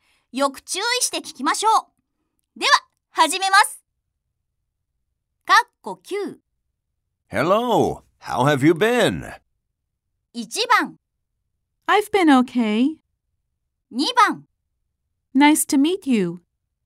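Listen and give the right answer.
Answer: 1: I've been okay.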